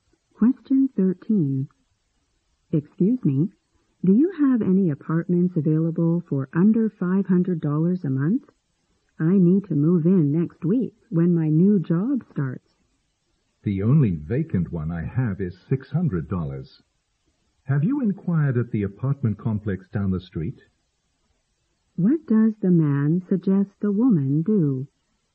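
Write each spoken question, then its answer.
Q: What does the man suggest the woman do?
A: Ask at the apartment complex down the street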